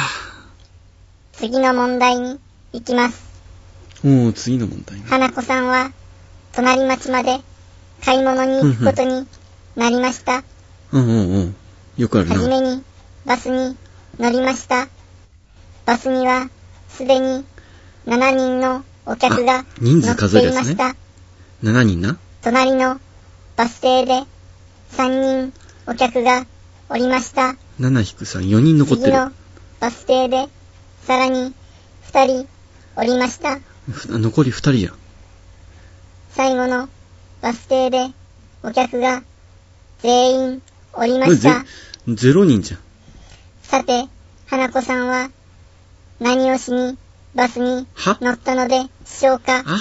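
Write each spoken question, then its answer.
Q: さて、花子さんは何をしにバスに乗ったのでしょうか?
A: 隣町まで買い物に行くため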